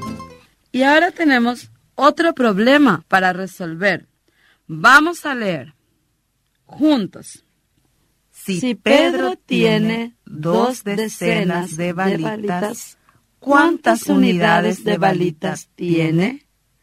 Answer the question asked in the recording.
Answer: Tiene en total 20 balitas.